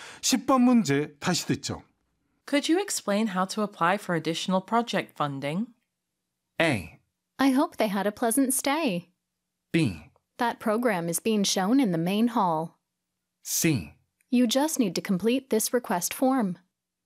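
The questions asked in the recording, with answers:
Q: Could you explain how to apply for additional project funding?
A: C: You just need to complete this request form.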